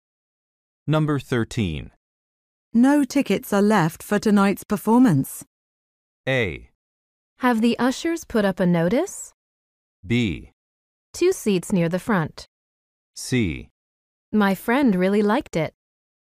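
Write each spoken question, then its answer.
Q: No tickets are left for tonight's performance.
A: A: Have the ushers put up a notice?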